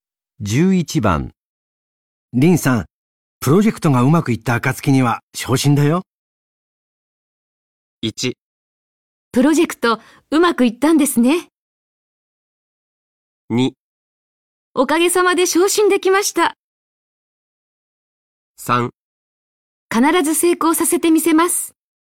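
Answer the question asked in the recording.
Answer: 3: 必ず成功させてみせます。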